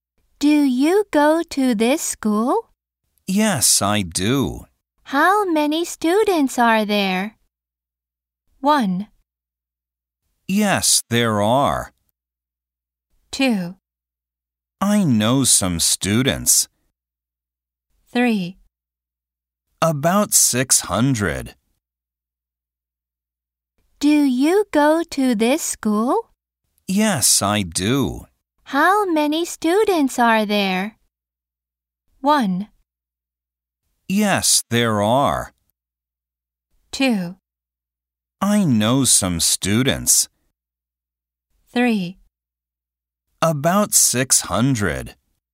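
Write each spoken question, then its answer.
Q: How many students are there?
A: 3: About 600.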